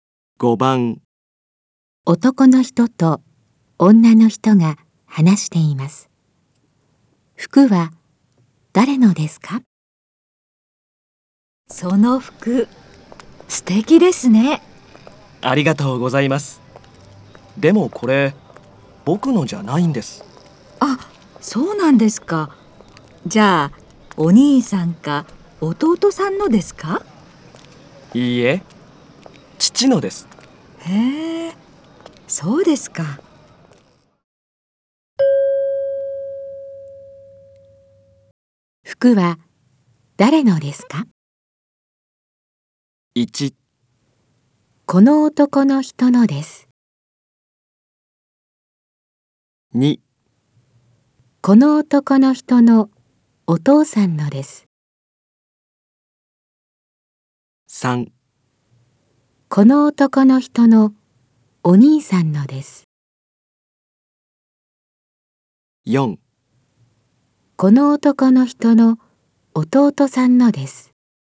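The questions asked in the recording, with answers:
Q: 服は誰のですか?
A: 2: この男の人のお父さんのです。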